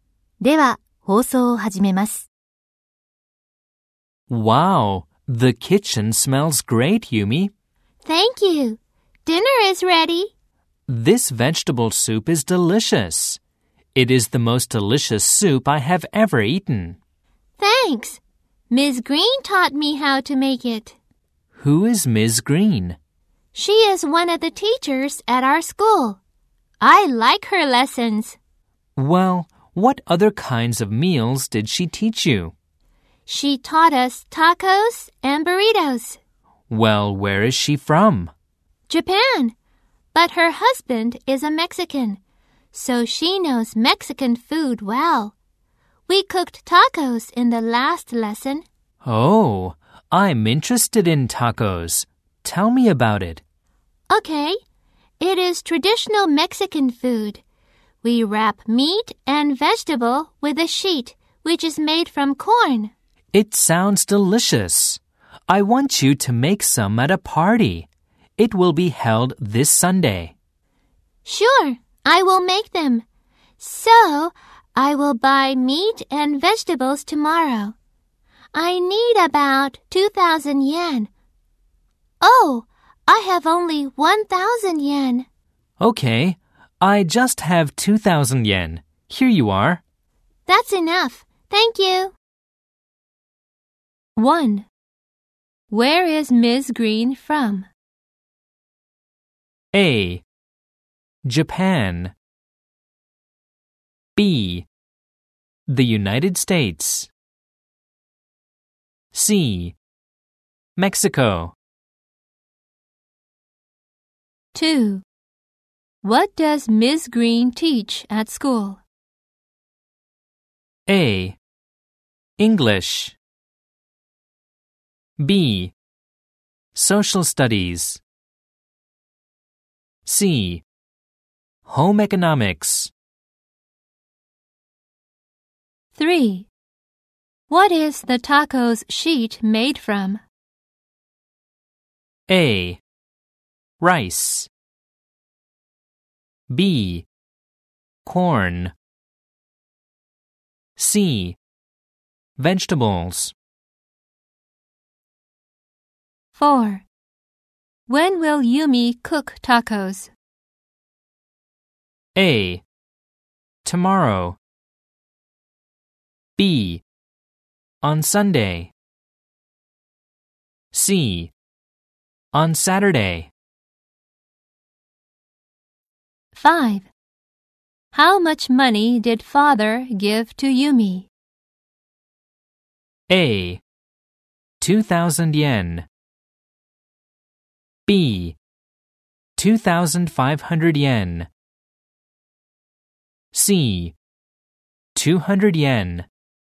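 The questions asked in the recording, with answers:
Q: Where is Ms. Green from?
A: A: Japan.

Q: What is the taco's sheet made from?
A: B: Corn.

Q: When will Yumi cook tacos?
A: B: On Sunday.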